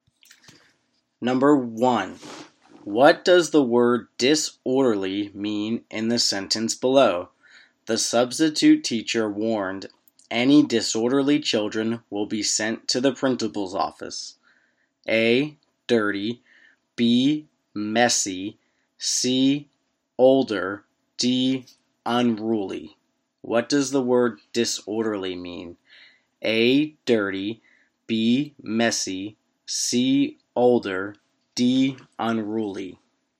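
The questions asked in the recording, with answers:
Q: what does the word disorderly mean in the sentence below?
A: D: unruly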